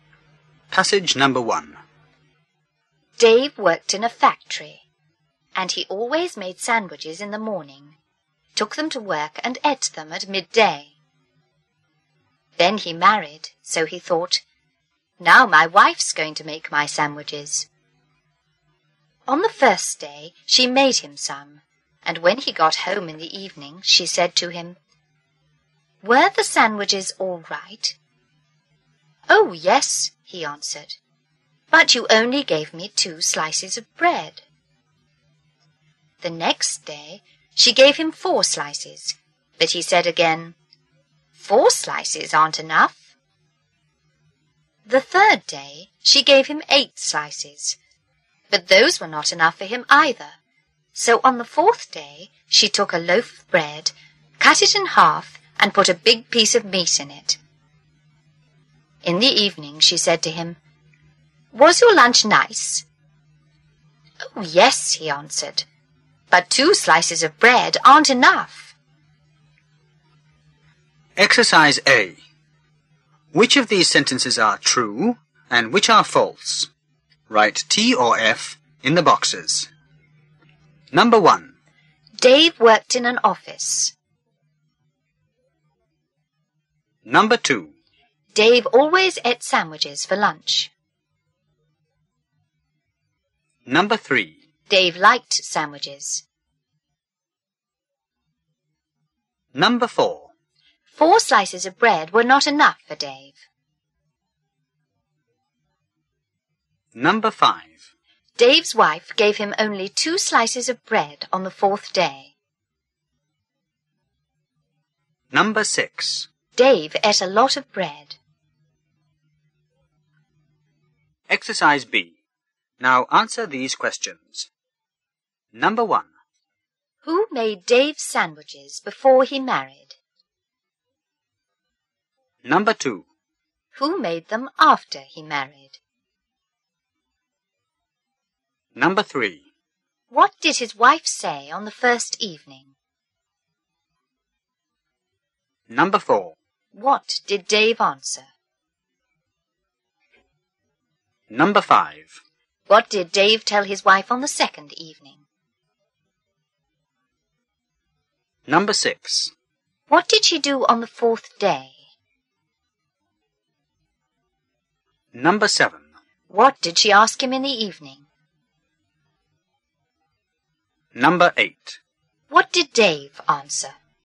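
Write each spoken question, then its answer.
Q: Dave worked in an office.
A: False

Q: Dave always ate sandwiches for lunch.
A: True

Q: 4 slices of bread were not enough for Dave.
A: True

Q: Dave ate a lot of bread.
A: True

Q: Who made Dave's sandwiches before he married?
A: Dave himself

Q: Who made them after he married?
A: His wife

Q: What did his wife say on the first evening?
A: Were the sandwiches all right?

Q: What did Dave answer?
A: Yes, but you only gave me 2 slices of bread.

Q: What did Dave tell his wife on the second evening?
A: 4 slices aren't enough.

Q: What did she do on the fourth day?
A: She cut a loaf of bread in half and put a big piece of meat in it.

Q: What did she ask him in the evening?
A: Was your lunch nice?

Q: What did Dave answer?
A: Yes, but 2 slices of bread aren't enough.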